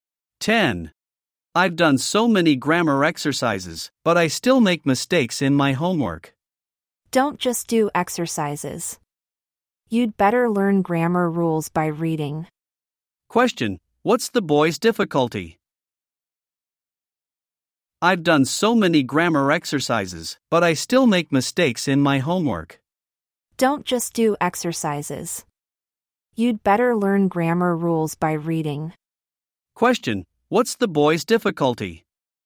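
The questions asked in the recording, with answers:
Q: what's the boy's difficulty?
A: He still makes grammar mistakes in his homework.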